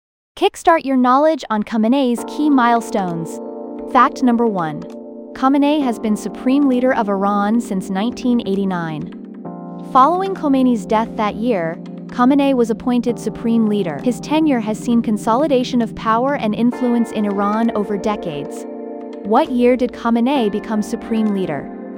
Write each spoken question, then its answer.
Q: What year did Khamenei become supreme leader?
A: Correct answer, 1989.